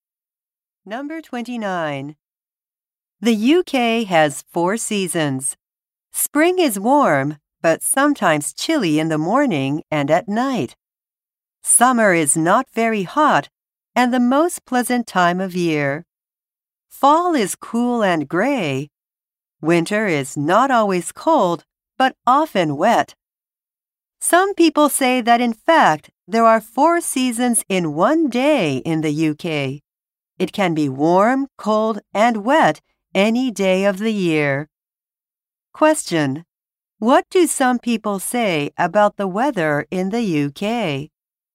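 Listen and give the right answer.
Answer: There are four seasons in one day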